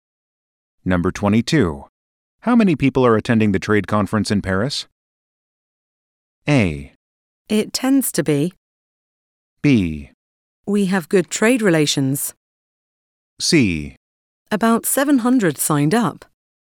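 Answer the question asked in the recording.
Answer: C: About 700 signed up.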